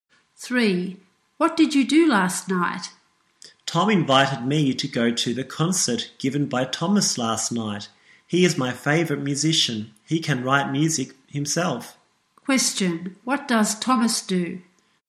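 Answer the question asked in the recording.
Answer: He is a musician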